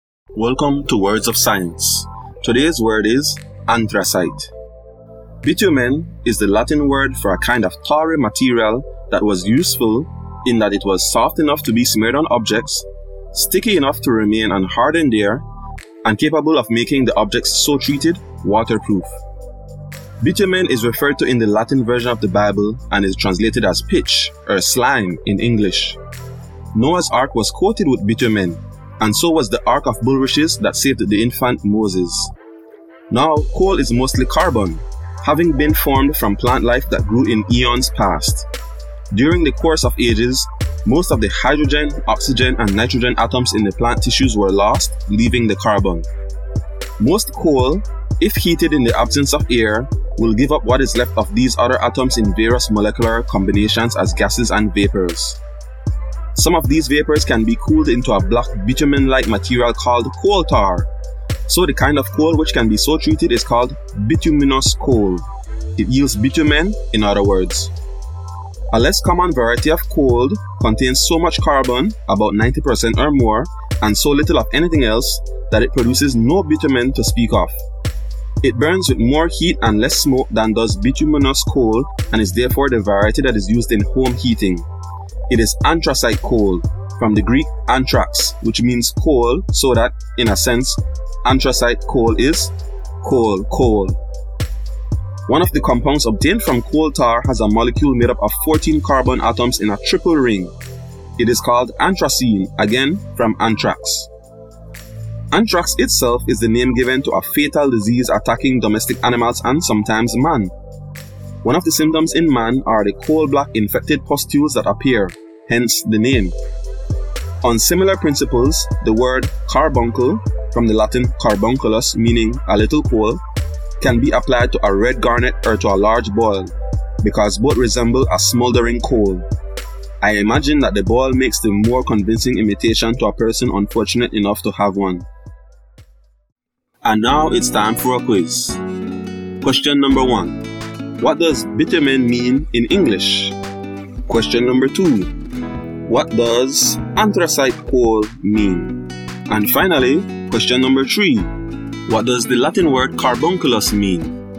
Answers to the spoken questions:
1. pitch or slime
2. coal
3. a little coal